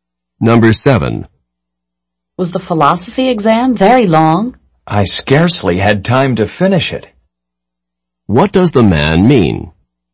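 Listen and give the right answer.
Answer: The exam was long; he barely had time to finish it.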